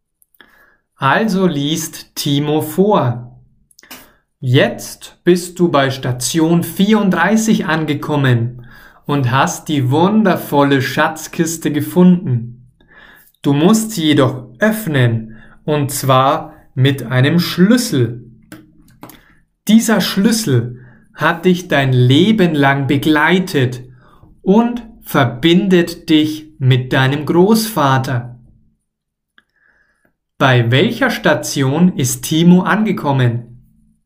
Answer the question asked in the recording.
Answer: bei Station 34. Er, also Timo, ist bei Station 34 angekommen.